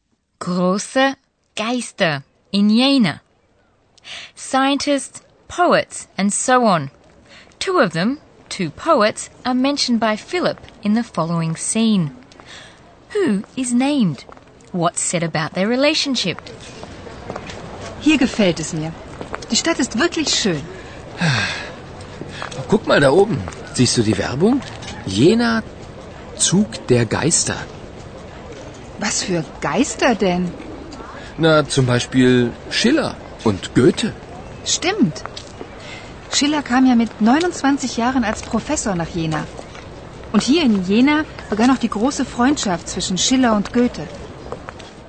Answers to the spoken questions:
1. Philip mentions Schiller and Goethe, the two great poets.
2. And it was in Jena that the great, long-lasting friendship, Freundschaft, between Schiller and Goethe began.